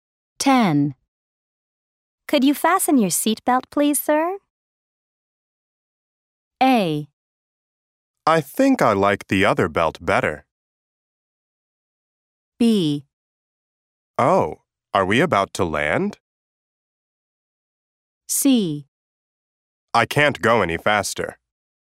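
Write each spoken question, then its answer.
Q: Could you fasten your seatbelt, please, sir?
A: B: Oh, are we about to land?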